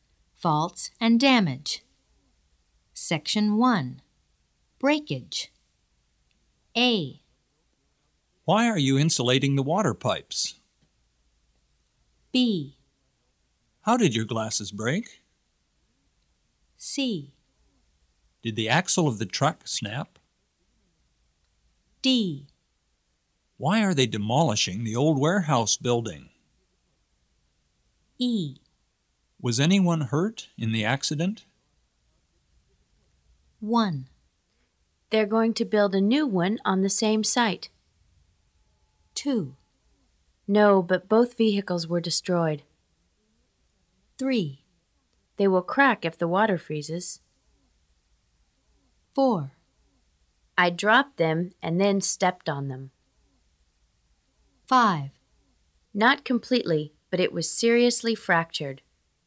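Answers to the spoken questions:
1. D: Why are they demolishing the old warehouse building?
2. E: Was anyone hurt in the accident?
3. A: Why are you insulating the water pipes?
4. B: How did your glasses break?
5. C: Did the axle of the truck snap?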